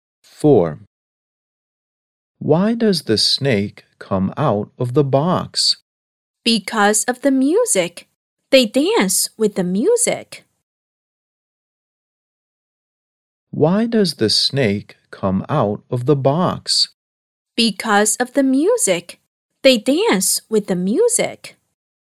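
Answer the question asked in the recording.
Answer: Because of the music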